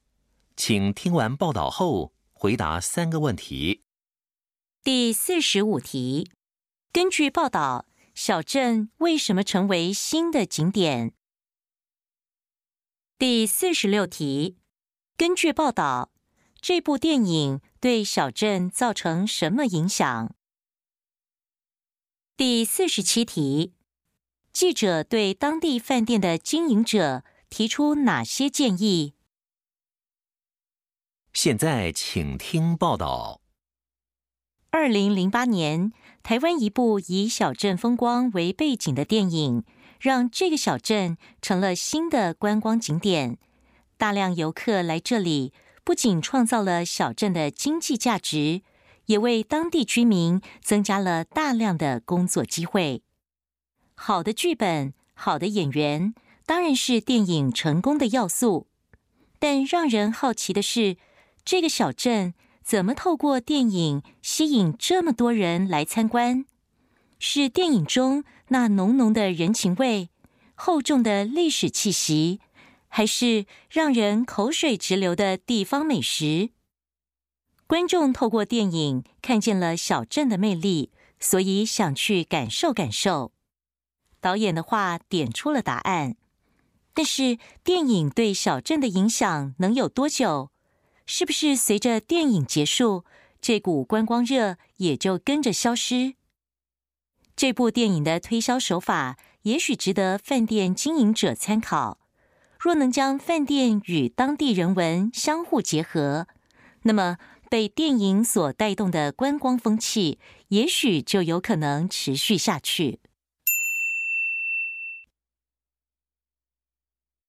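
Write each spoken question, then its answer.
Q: 根据报道,小镇为什么成为新的景点?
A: 因为2008年一部以小镇风光为背景的台湾电影

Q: 根据报道,这部电影对小镇造成什么影响?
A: 吸引大量游客,创造经济价值,为居民增加工作机会

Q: 记者对当地饭店的经营者提出哪些建议?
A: 参考电影的推销手法,将饭店与当地人文相结合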